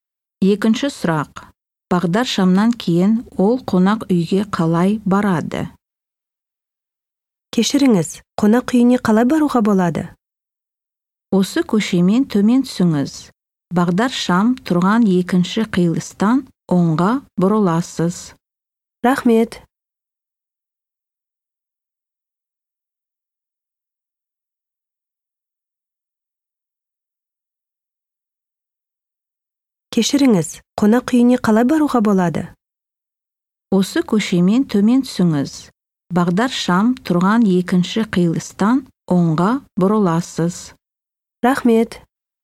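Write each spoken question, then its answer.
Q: Бағдар шамнан кейін ол қонақ үйге қалай барады?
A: оңға бұрылады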